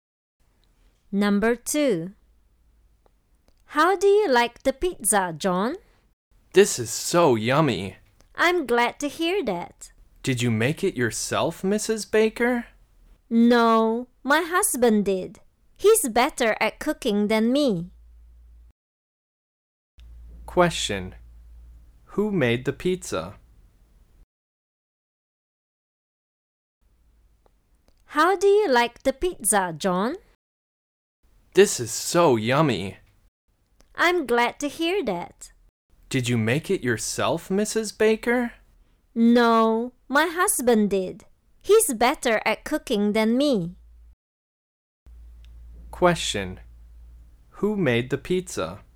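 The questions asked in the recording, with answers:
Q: Who made the pizza?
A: Mrs. Baker's husband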